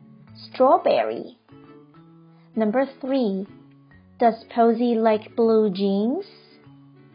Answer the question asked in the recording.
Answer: No.